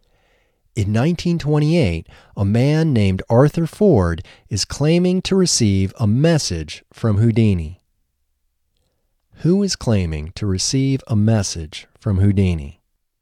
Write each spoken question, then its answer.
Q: Who is claiming to receive a message from Houdini?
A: Arthur Ford is claiming to receive a message from Houdini.